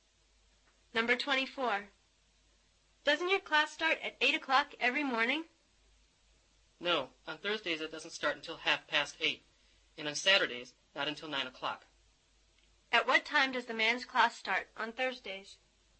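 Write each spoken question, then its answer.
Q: At what time does the man's class start on Thursdays?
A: 8:30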